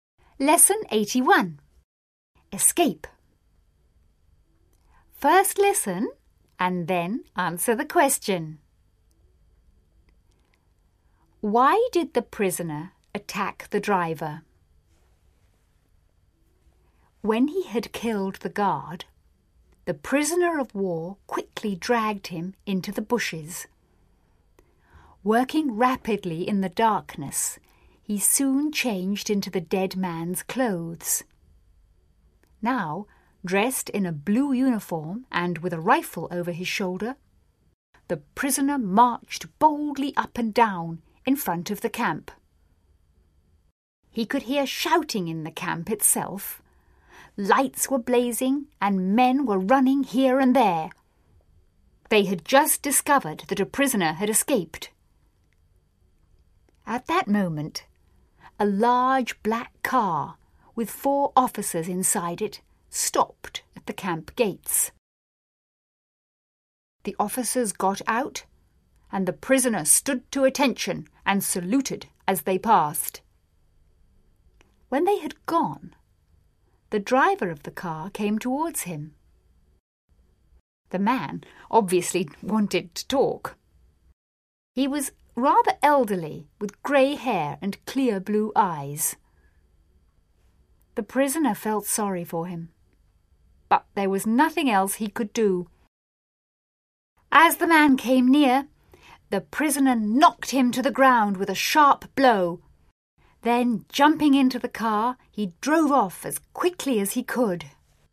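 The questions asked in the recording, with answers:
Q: Why did the prisoner attack the driver?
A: So he could take the car and escape.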